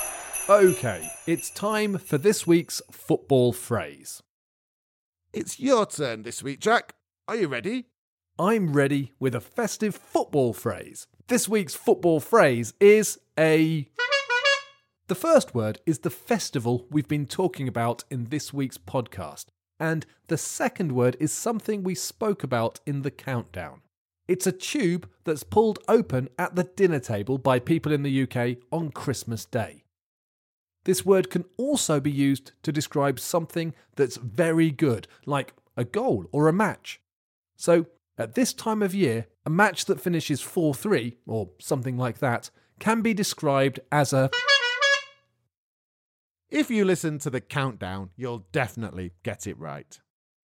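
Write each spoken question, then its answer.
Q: So, at this time of year, a match that finishes 4-3, or something like that, can be described as a...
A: a Christmas cracker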